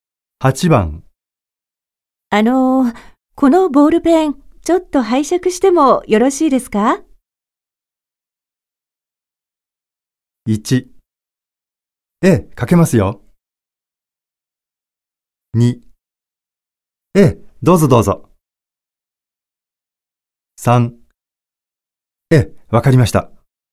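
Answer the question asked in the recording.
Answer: 2: え、どうぞどうぞ。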